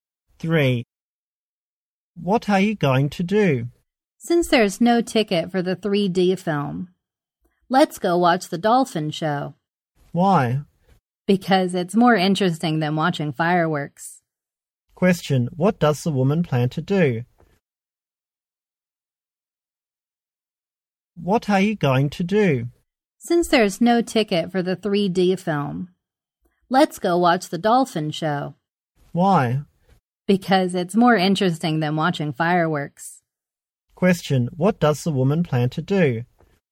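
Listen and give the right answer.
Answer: Watch the dolphin show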